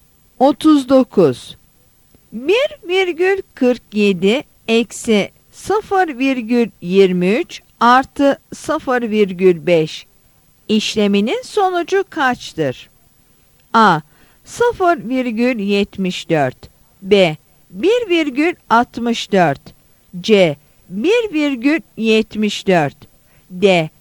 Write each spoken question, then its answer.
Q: 1,47 eksi 0,23 artı 0,5 işleminin sonucu kaçtır?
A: Yanıt C'dir.